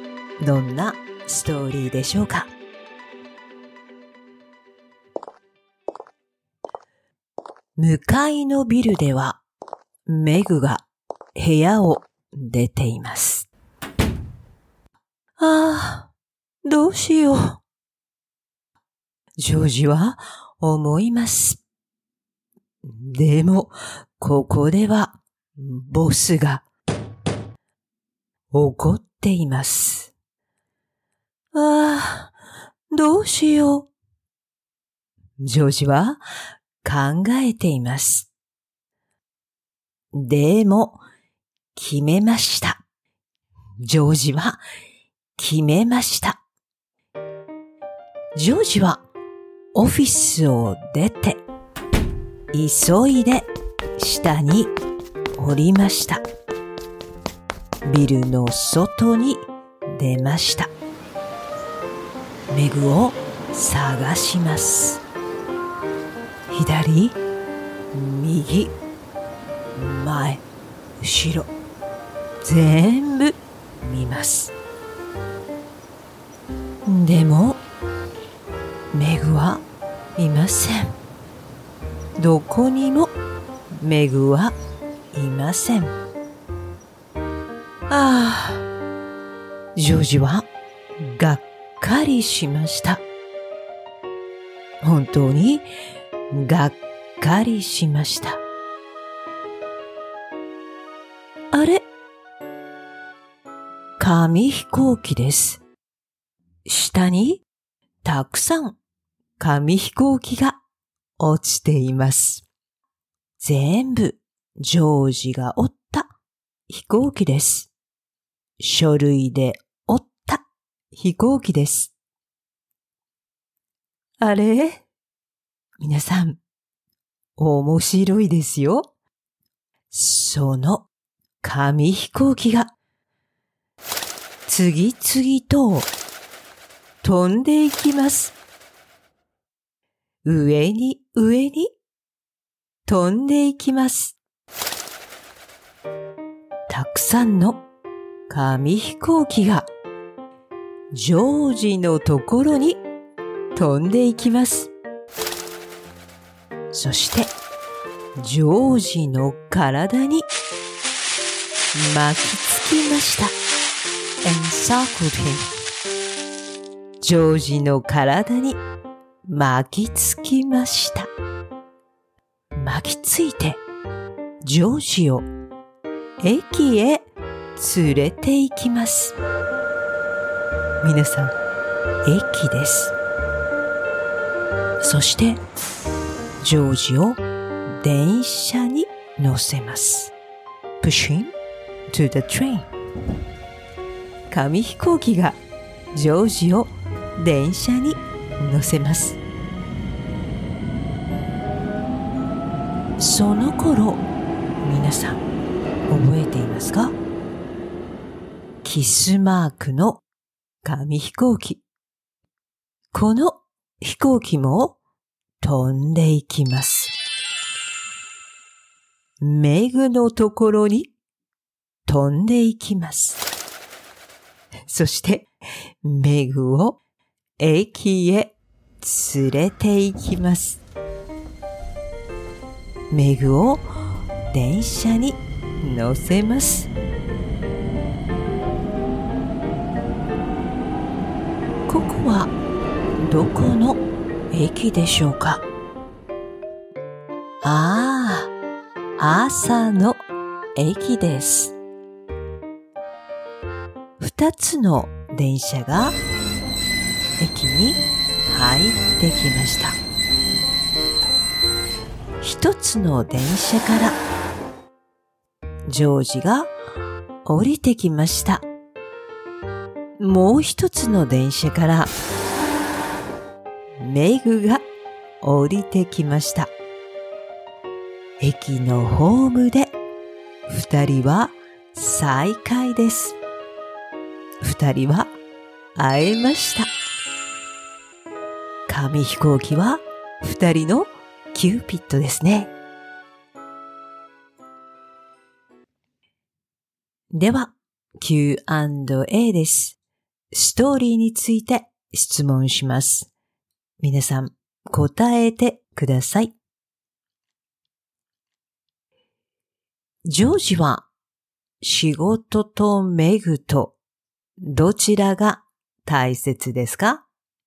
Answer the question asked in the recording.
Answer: メグです。メグの方が大切です。